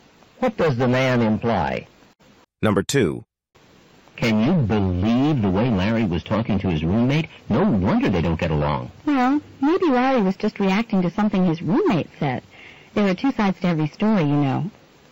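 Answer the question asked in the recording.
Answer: Larry may not be entirely to blame; there are two sides to every story.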